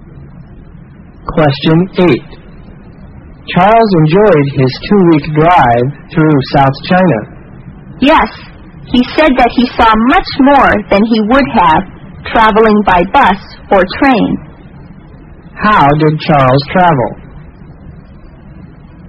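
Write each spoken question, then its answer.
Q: How did Charles travel?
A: By car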